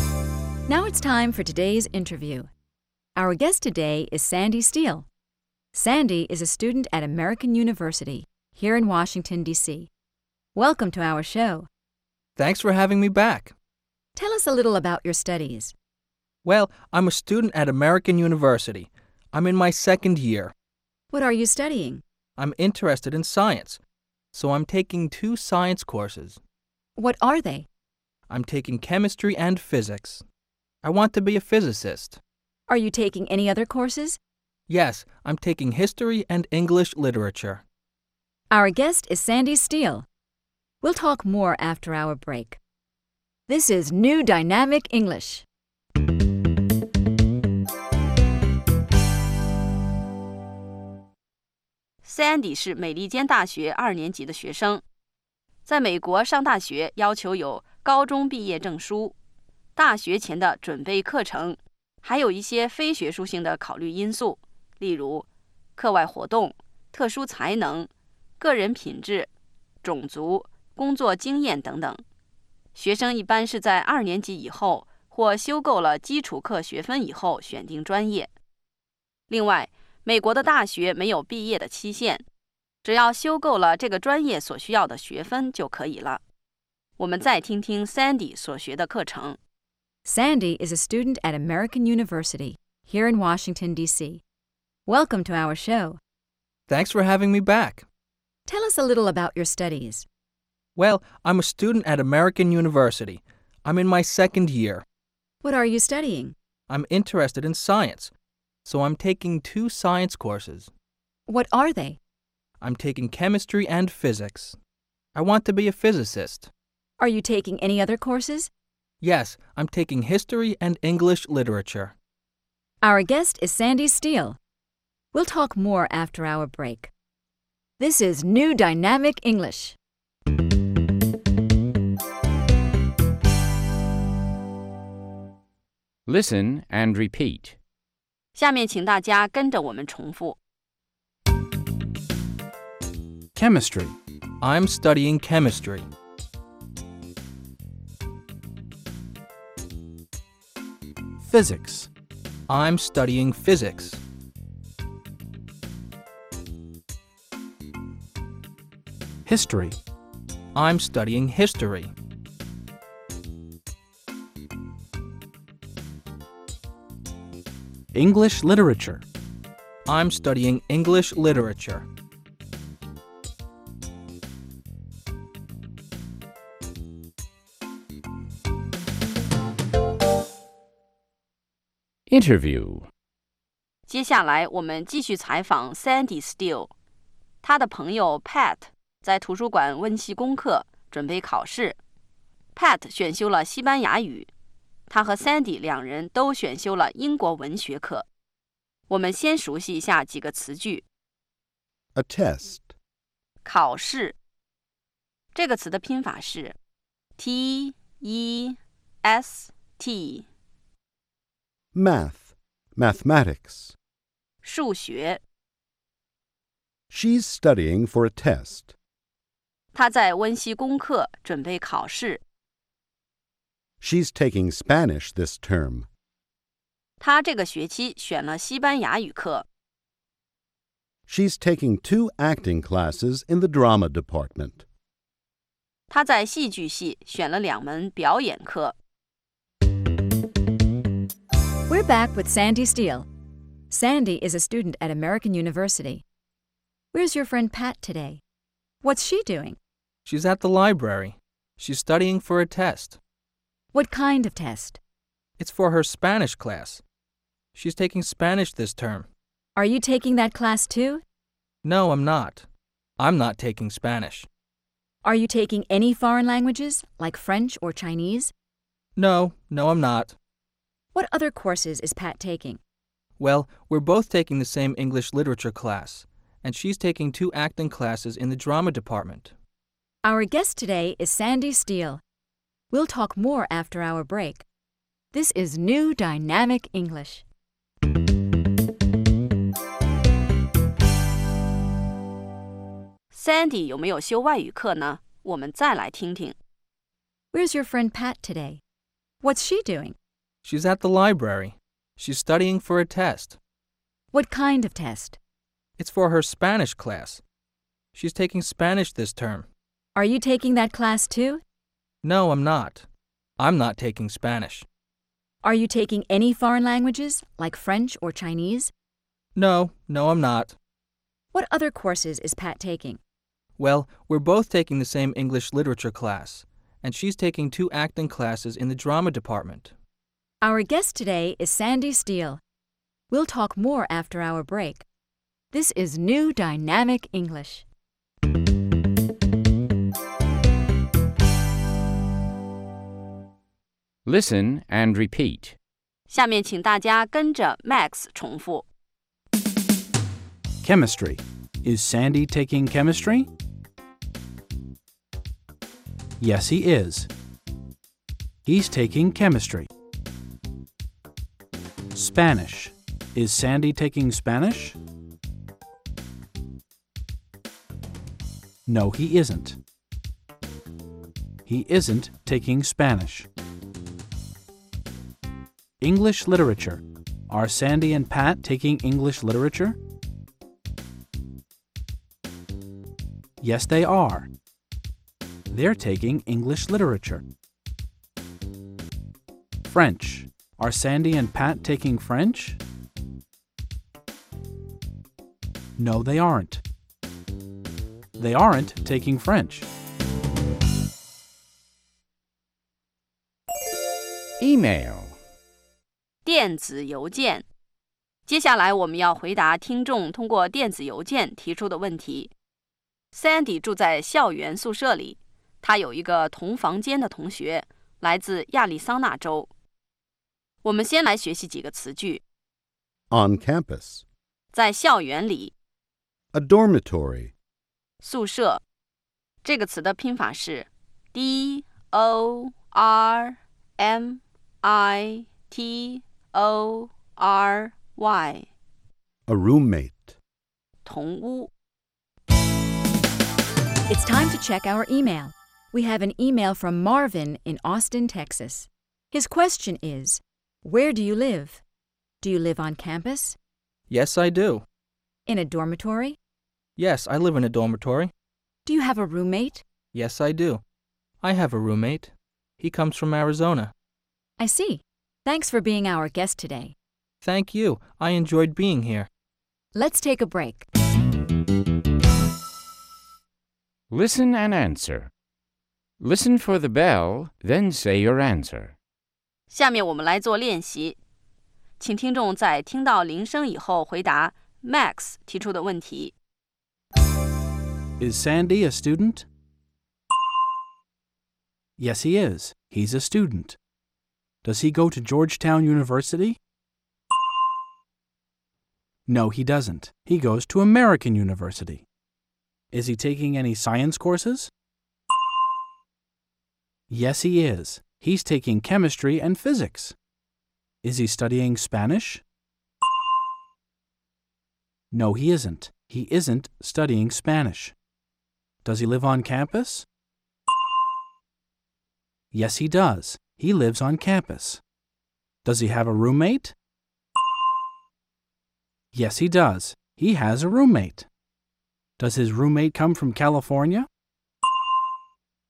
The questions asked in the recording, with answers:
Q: Is Sandy a student?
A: Yes, he is. He's a student.

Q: Does he go to Georgetown University?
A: No, he doesn't. He goes to American University.

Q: Is he taking any science courses?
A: Yes, he is. He's taking chemistry and physics.

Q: Is he studying Spanish?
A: No, he isn't. He isn't studying Spanish.

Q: Does he have a roommate?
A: Yes, he does.

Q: Does his roommate come from California?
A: No, he doesn't. Sandy's roommate comes from Arizona.